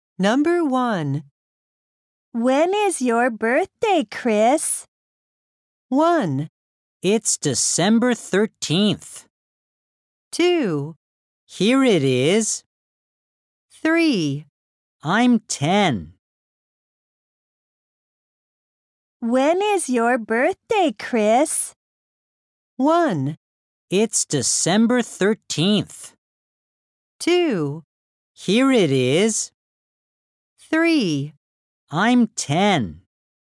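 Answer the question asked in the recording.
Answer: 1: It's December 13th.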